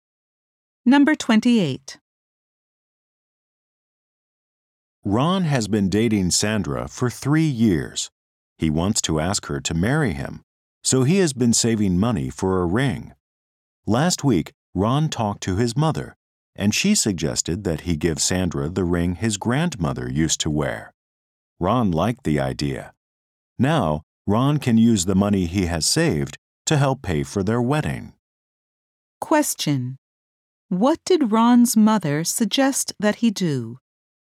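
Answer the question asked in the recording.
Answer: Give Sandra his grandmother's ring.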